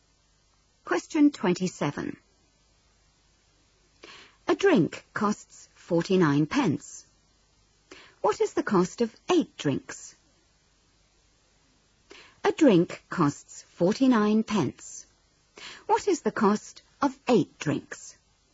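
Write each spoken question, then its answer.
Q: What is the cost of 8 drinks?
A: £3.92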